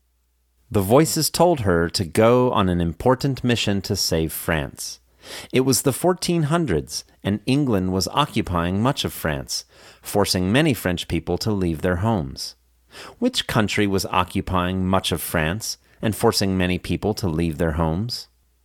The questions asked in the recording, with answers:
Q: Which country was occupying much of France and forcing many people to leave their homes?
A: England was occupying much of France, forcing many French people to leave their homes.